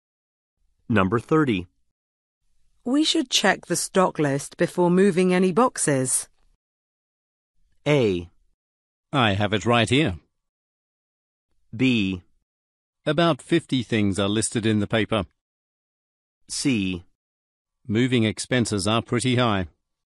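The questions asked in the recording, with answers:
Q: We should check the stock list before moving any boxes.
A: A: I have it right here.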